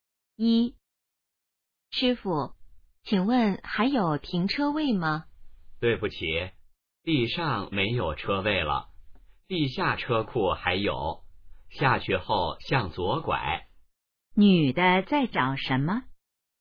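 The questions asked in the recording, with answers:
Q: 女的在找什么?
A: 停车位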